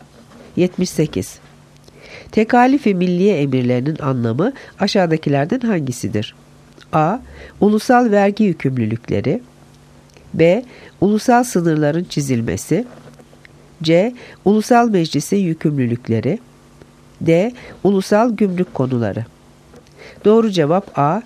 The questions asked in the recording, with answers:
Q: Tekalif-i Milliye emirlerinin anlamı aşağıdakilerden hangisidir?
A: Doğru cevap A. Ulusal vergi yükümlülükleri.